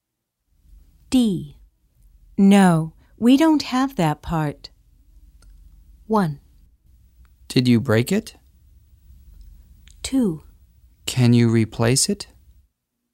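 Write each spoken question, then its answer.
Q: No, we don't have that part.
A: 2: Can you replace it?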